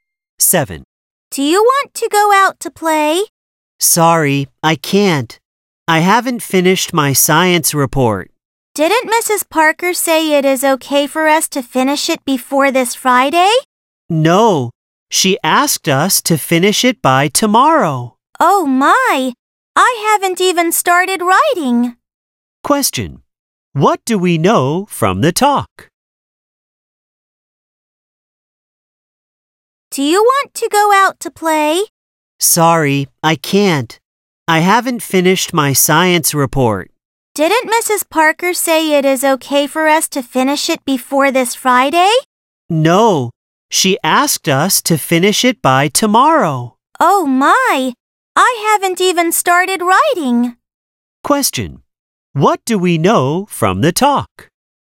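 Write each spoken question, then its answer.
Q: What do we know from the talk?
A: The science report is due tomorrow, and the speaker hasn't started it.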